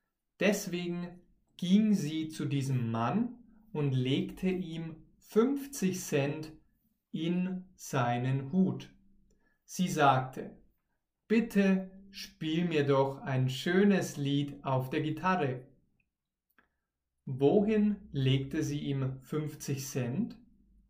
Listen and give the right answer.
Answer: In seinen Hut. Sie legte ihm 50 Cent in seinen Hut.